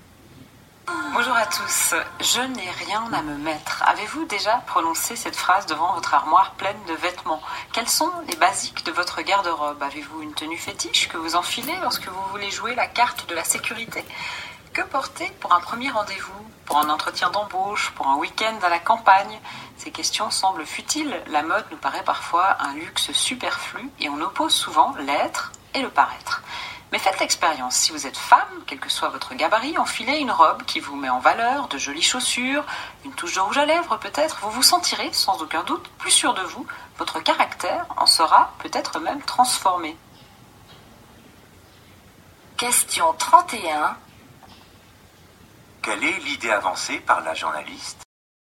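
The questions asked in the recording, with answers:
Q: Quelle est l'idée avancée par la journaliste ?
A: Les vêtements peuvent donner confiance en soi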